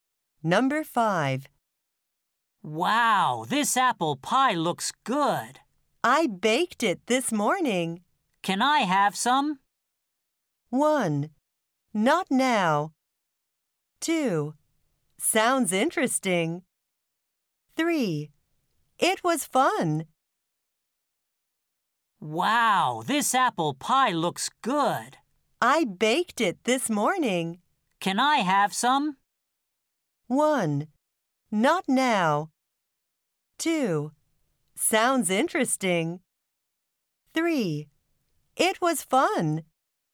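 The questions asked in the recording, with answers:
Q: Can I have some?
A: 1: Not now.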